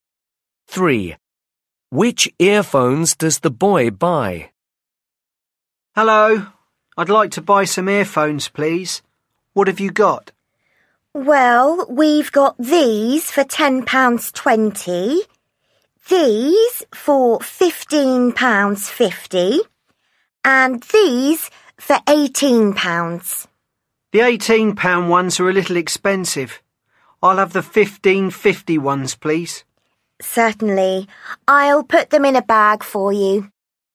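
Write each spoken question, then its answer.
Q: Which earphones does the boy buy?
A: the £15.50 ones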